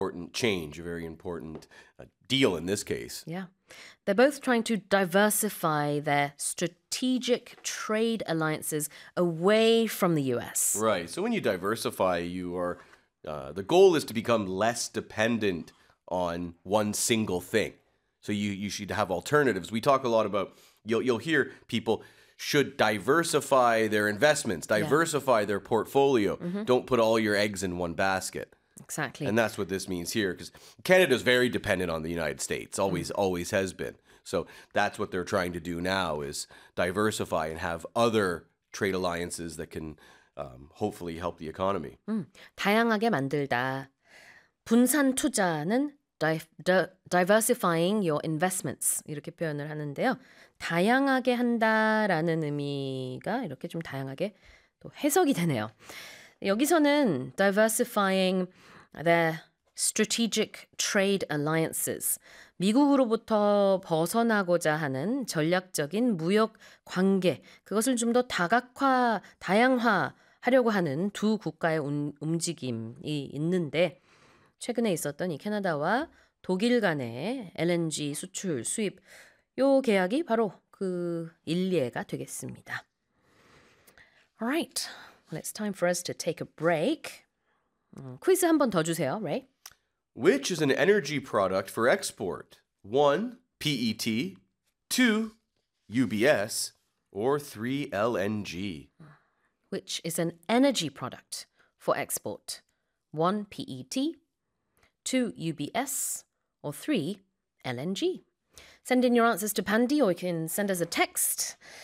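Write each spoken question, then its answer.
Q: Which is an energy product for export?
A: 3: LNG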